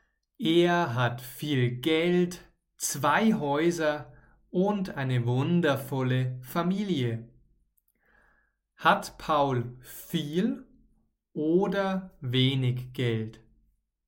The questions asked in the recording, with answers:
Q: Hat Paul viel oder wenig Geld?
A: Viel Geld. Paul hat ganz viel Geld.